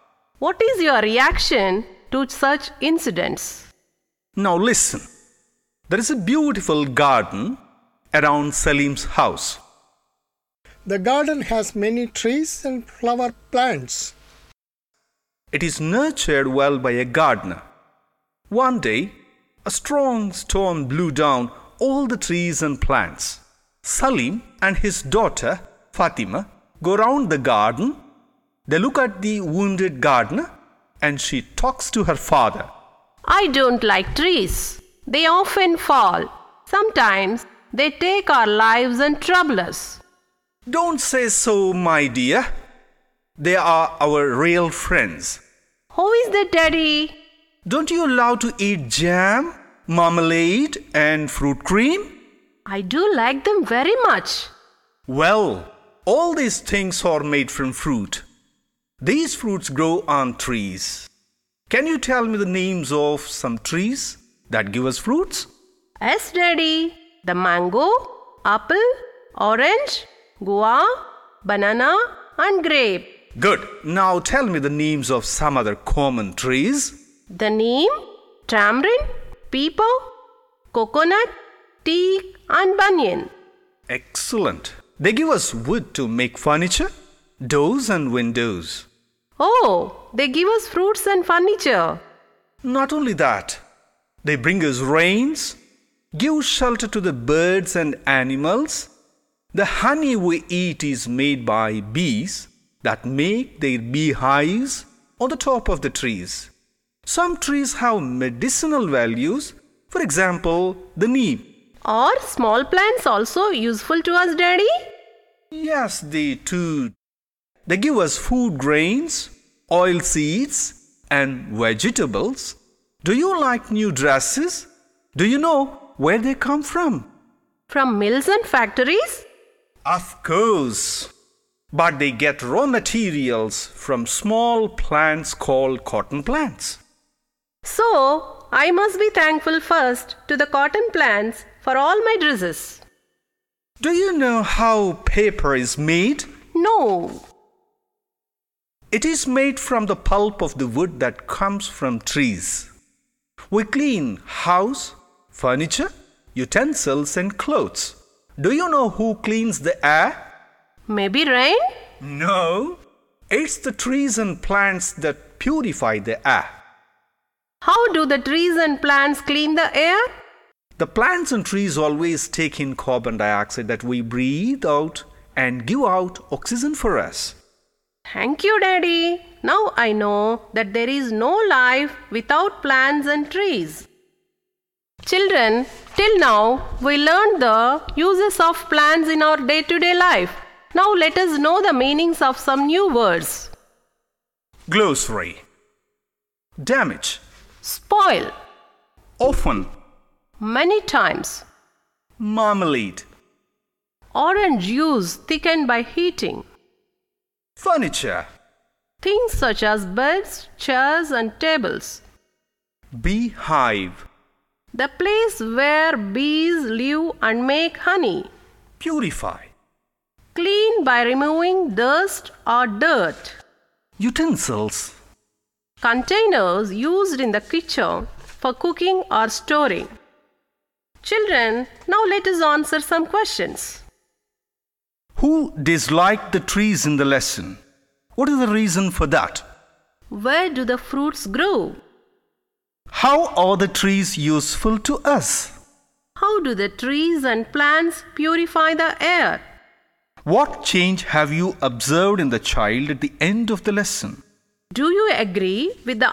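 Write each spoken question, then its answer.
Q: Who disliked the trees in the lesson?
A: Fatima, Salim's daughter

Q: What is the reason for that?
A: Trees often fall and sometimes take our lives and trouble us

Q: Where do the fruits grow?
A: On trees

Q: How are the trees useful to us?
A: They give fruit, wood for furniture, rain, shelter for birds and animals, honey, medicine, paper, and they clean the air

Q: How do the trees and plants purify the air?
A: They take in the carbon dioxide we breathe out and give out oxygen

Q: What change have you observed in the child at the end of the lesson?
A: She realises there is no life without plants and trees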